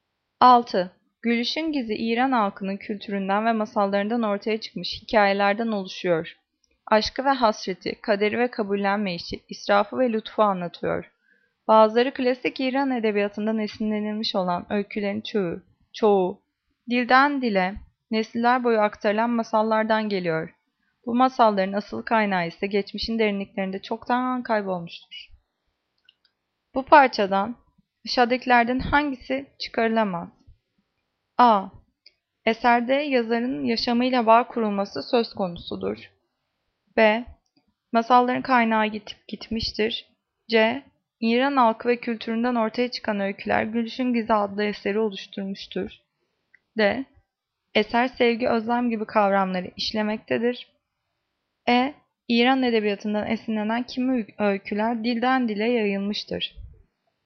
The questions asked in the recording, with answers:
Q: Bu parçadan aşağıdakilerden hangisi çıkarılamaz?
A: Cevap A. Eserde yazarın yaşamıyla bağ kurulması söz konusudur.